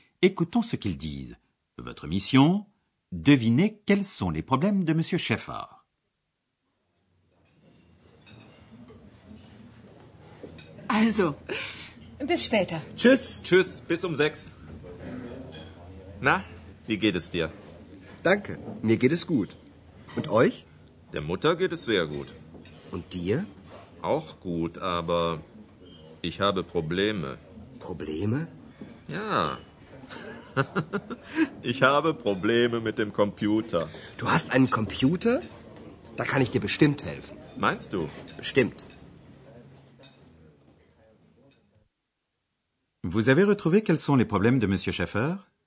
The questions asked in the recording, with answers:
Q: Vous avez retrouvé quels sont les problèmes de Monsieur Schaeffer?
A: Il a des difficultés avec son ordinateur.